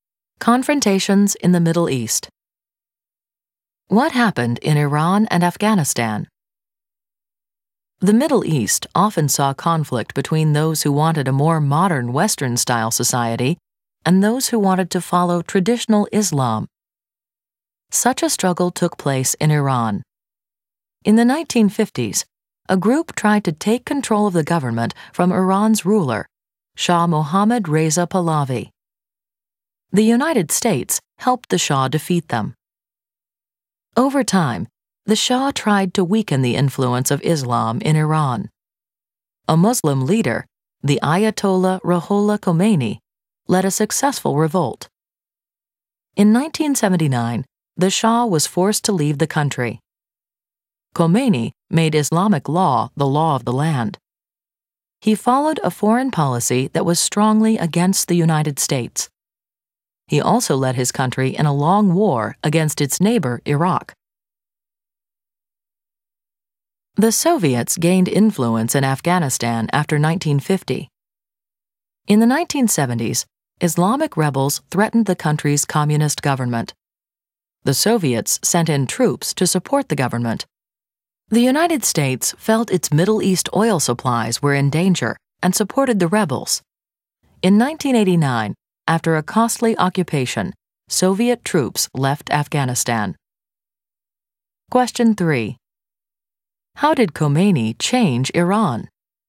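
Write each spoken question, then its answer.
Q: How did Khomeini change Iran?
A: He made Islamic law the law of the land and followed a foreign policy strongly against the United States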